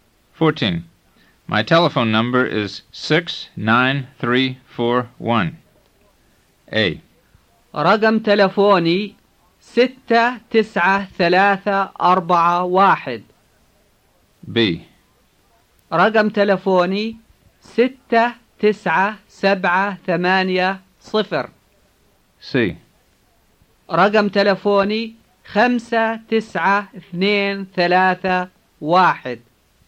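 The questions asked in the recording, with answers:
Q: My telephone number is 69341.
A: A: رقم تلفوني 69341.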